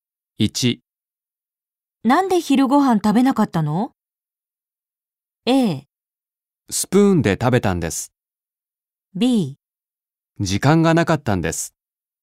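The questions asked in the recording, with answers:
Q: なんで昼ご飯食べなかったの?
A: B: 時間がなかったんです。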